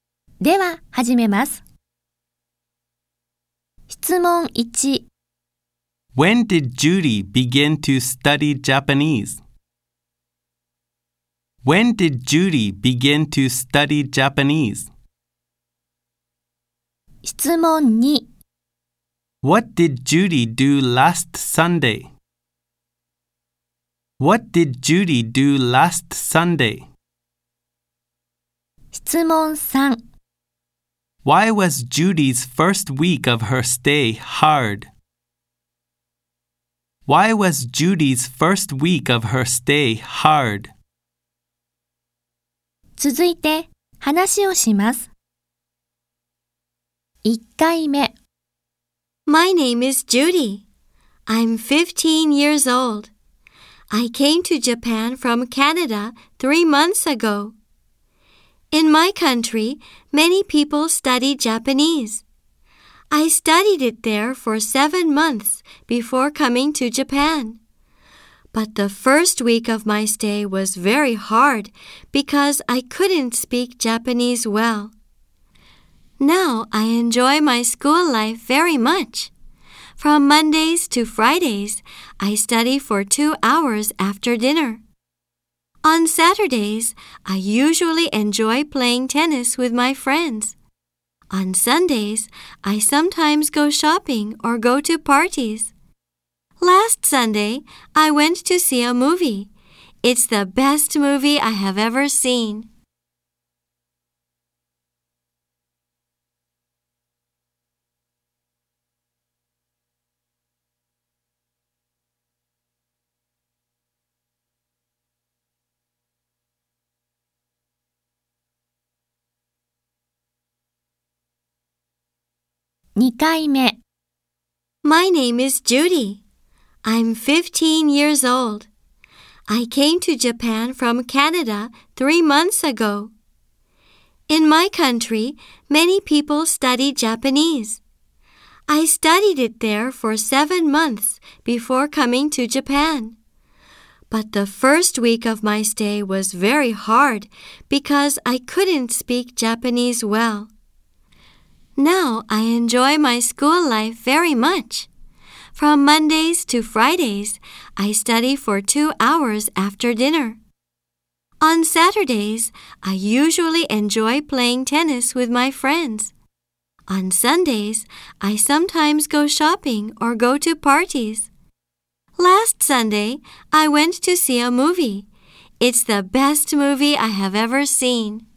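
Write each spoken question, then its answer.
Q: When did Judy begin to study Japanese?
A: Ten months ago.

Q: What did Judy do last Sunday?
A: She went to see a movie.

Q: Why was Judy's first week of her stay hard?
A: Because she couldn't speak Japanese well.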